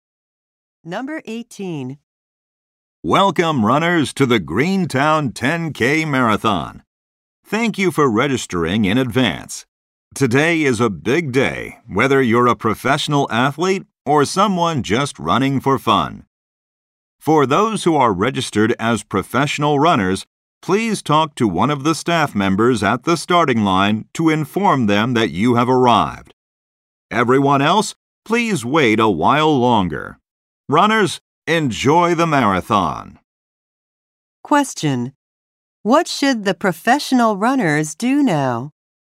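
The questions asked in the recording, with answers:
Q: What should the professional runners do now?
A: Tell a staff member at the starting line that they have arrived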